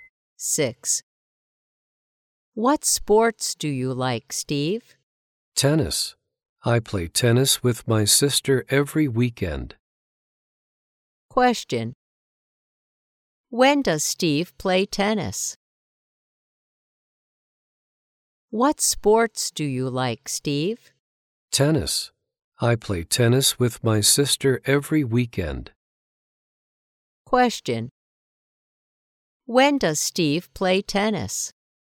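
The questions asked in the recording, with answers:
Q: When does Steve play tennis?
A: Every weekend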